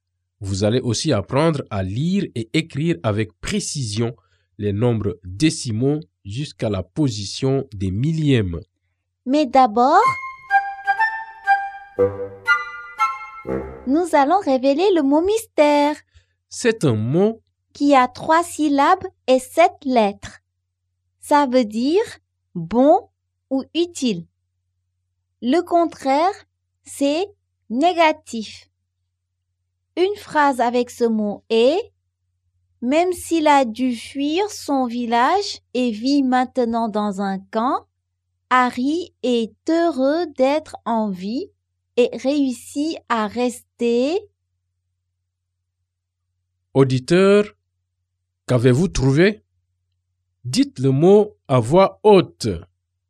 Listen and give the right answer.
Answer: Le mot mystère est « positif ».